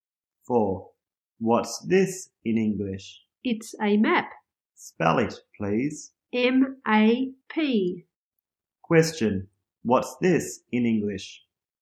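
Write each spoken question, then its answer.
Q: What's this in English?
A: A map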